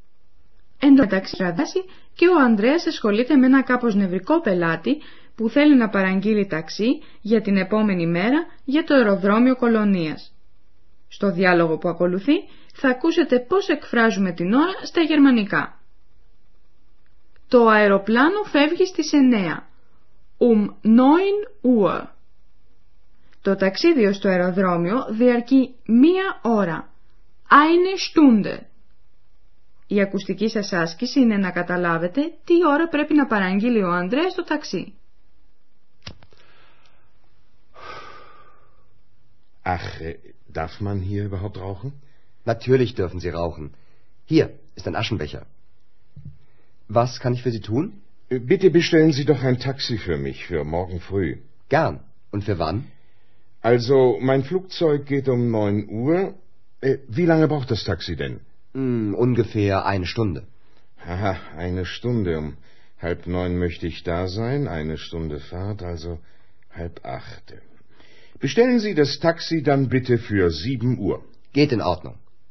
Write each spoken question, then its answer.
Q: Η ακουστική σας άσκηση είναι να καταλάβετε τι ώρα πρέπει να παραγγείλει ο Ανδρέας το ταξί.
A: Ο Ανδρές πρέπει λοιπόν να παραγγείλει το ταξί για τις 7 το επόμενο πρωί.